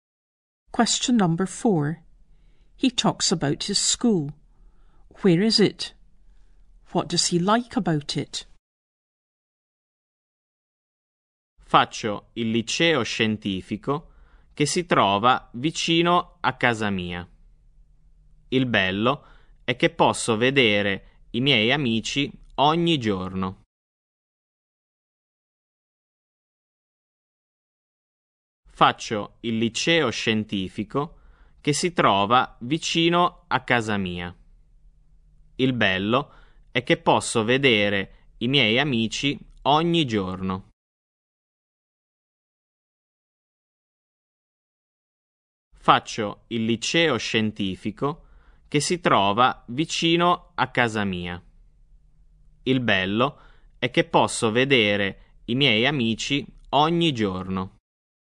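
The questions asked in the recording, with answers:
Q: Where is it? What does he like about it?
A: Near his house; he can see his friends every day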